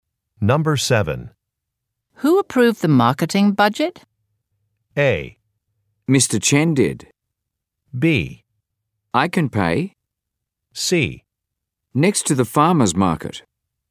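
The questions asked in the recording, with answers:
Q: Who approved the marketing budget?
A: A: Mr. Chen did.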